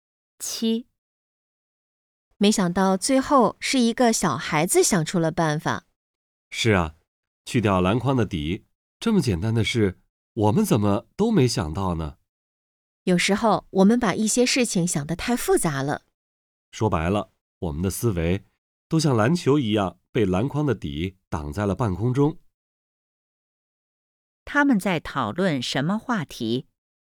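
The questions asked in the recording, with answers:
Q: 他们在讨论什么话题?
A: 思维方式:有时把事情想得太复杂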